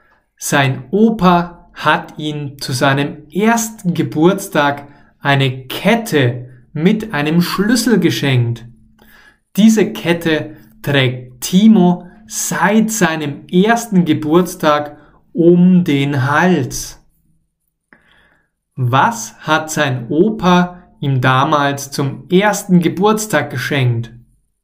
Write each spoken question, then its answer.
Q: Was hat sein Opa ihm damals zum ersten Geburtstag geschenkt?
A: Eine Kette. Sein Opa hat ihm damals eine Kette geschenkt.